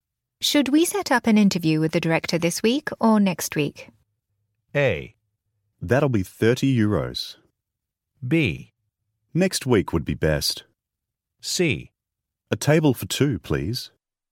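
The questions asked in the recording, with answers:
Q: Should we set up an interview with the director this week or next week?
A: B: Next week would be best.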